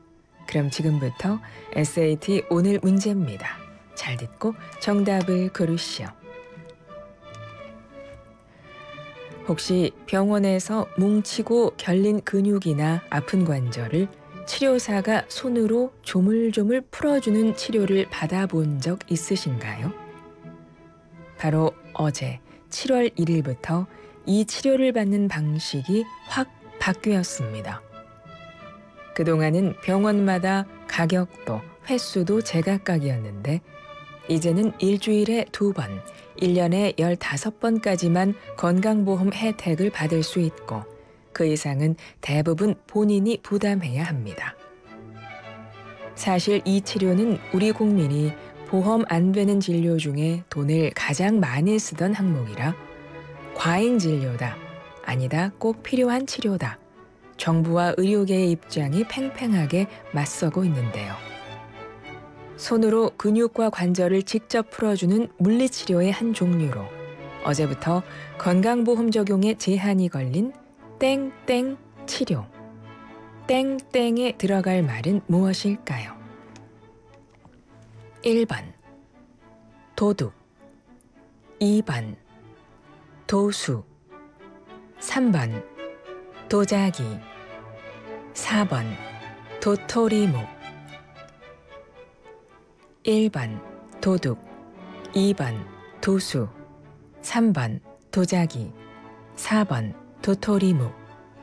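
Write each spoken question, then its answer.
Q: 땡땡에 들어갈 말은 무엇일까요?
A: 2: 도수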